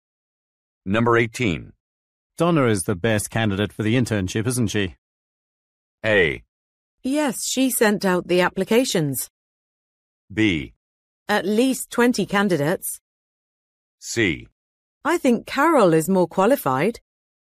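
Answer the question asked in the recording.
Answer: C: I think Carol is more qualified.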